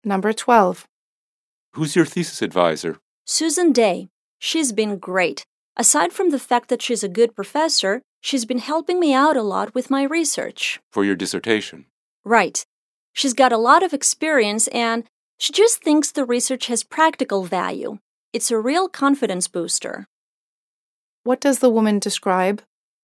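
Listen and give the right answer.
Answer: Her thesis advisor, Susan Day, who has been very helpful and supportive with her dissertation research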